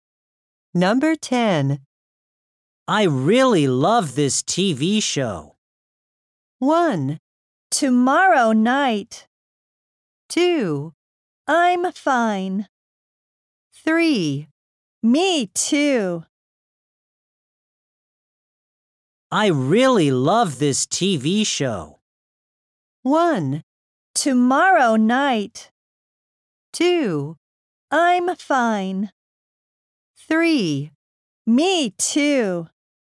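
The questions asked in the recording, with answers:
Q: I really love this TV show.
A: 3: Me too.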